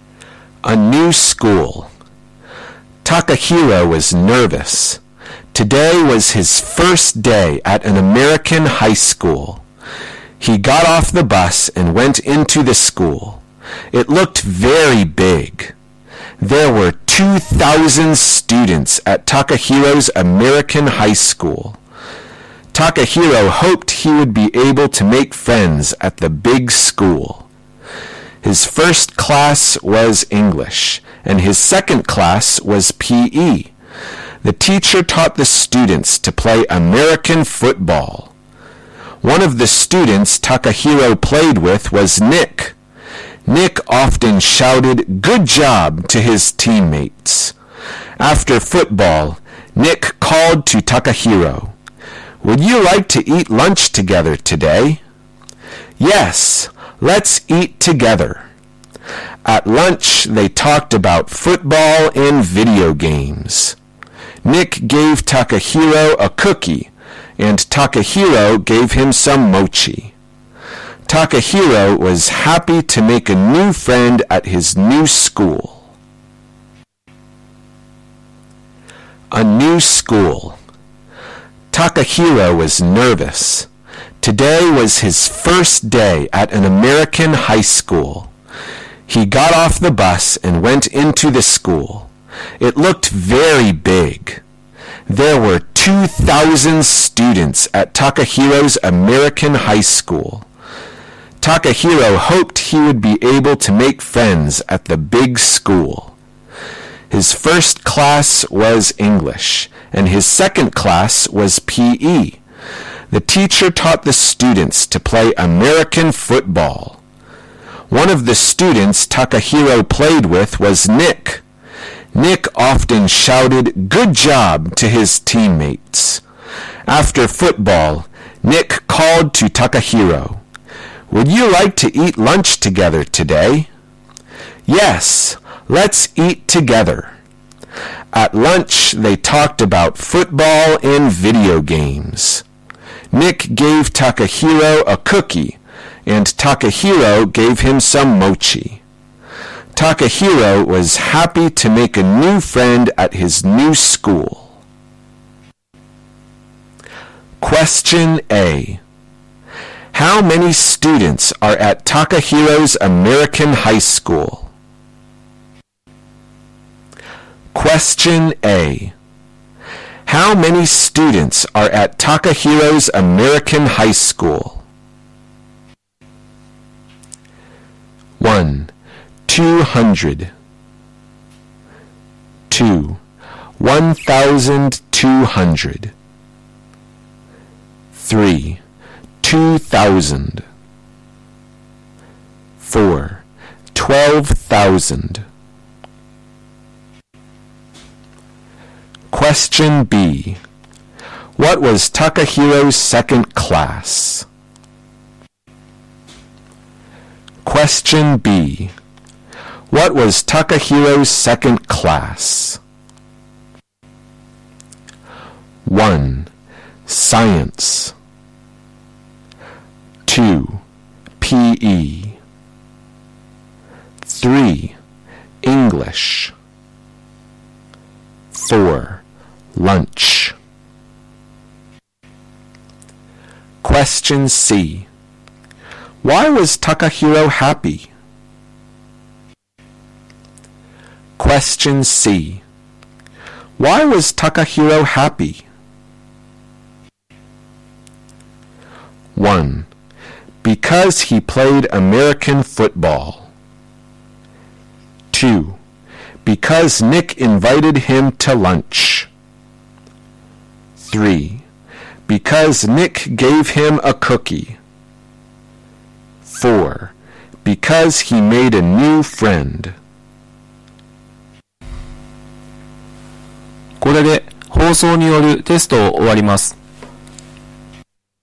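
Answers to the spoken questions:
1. 3: 2,000.
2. 2: PE.
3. 4: Because he made a new friend.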